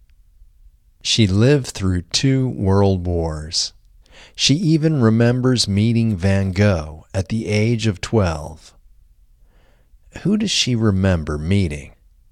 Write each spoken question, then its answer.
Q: Who does she remember meeting?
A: She remembers meeting Van Gogh at the age of 12.